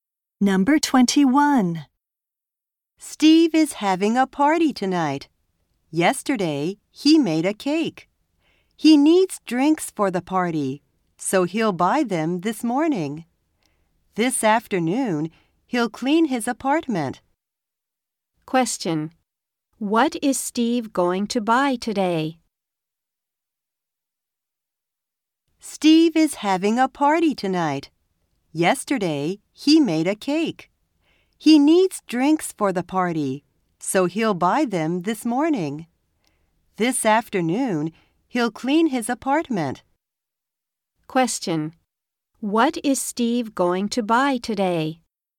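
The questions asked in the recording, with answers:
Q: What is Steve going to buy today?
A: Drinks for the party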